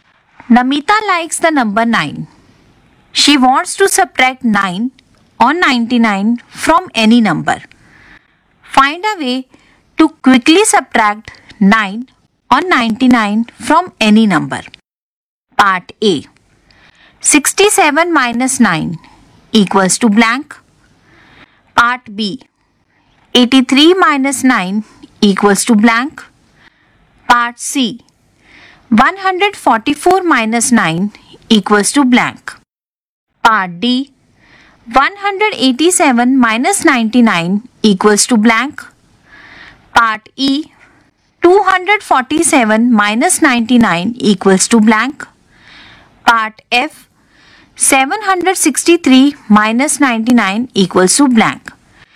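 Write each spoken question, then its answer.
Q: Part A. 67 minus 9 equals to blank.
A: 58

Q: Part B. 83 minus 9 equals to blank.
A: 74

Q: Part C. 144 minus 9 equals to blank.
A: 135

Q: Part D. 187 minus 99 equals to blank.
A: 88

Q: Part E. 247 minus 99 equals to blank.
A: 148

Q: Part F. 763 minus 99 equals to blank.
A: 664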